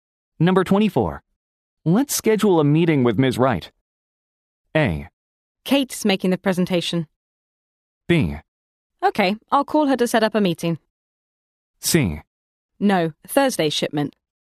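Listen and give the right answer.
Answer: B: Okay, I'll call her to set up a meeting.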